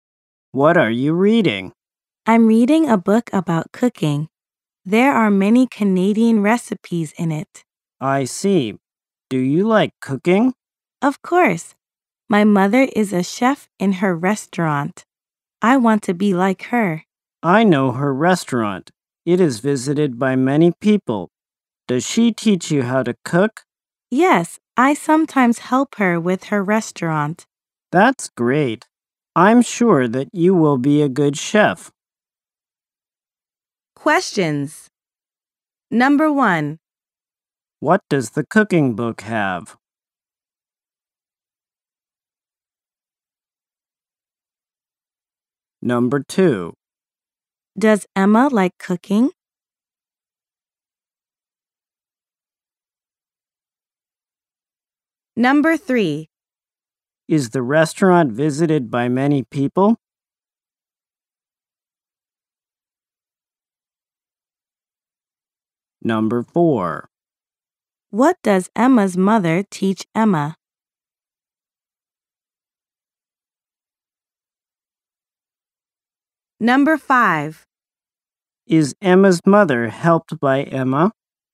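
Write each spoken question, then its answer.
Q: What does the cooking book have?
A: Many Canadian recipes

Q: Does Emma like cooking?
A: Yes, she does

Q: Is the restaurant visited by many people?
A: Yes, it is

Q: What does Emma's mother teach Emma?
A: How to cook

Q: Is Emma's mother helped by Emma?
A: Yes, she is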